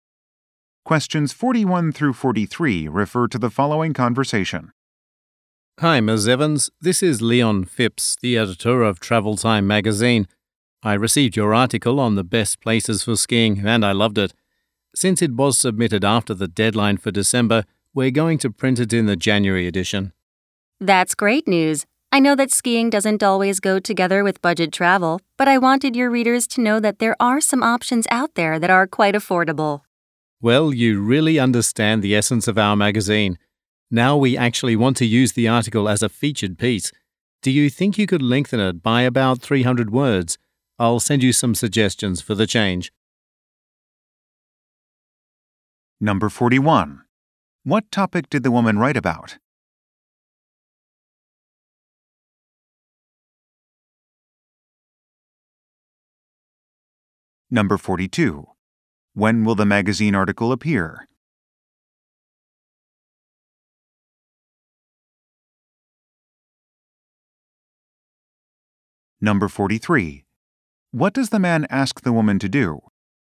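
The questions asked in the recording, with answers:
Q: What topic did the woman write about?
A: Affordable skiing destinations

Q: When will the magazine article appear?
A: In January

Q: What does the man ask the woman to do?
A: Lengthen the article by about 300 words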